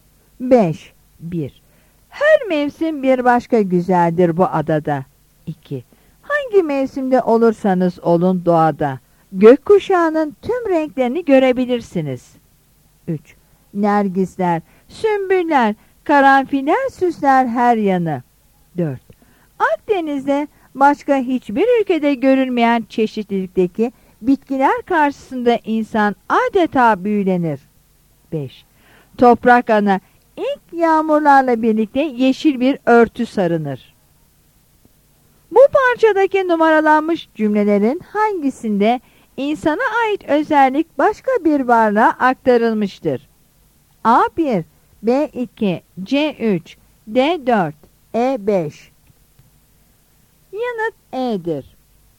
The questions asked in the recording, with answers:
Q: Bu parçadaki numaralanmış cümlelerin hangisinde insana ait özellik başka bir varlığa aktarılmıştır?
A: Yanıt E'dir.